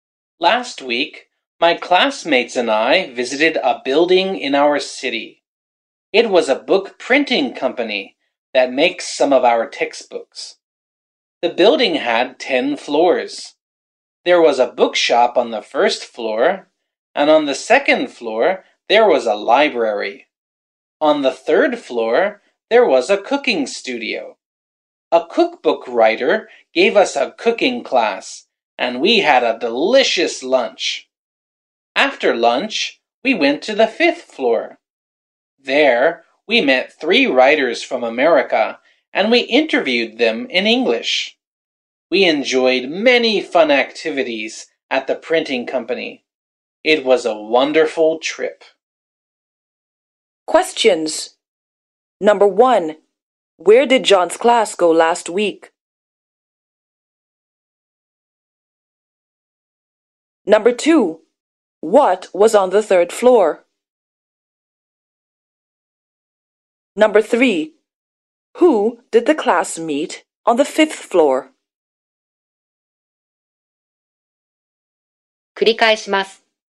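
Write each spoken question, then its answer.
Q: where did John's class go last week?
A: To a book printing company

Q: what was on the third floor?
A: A cooking studio

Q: who did the class meet on the fifth floor?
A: Three writers from America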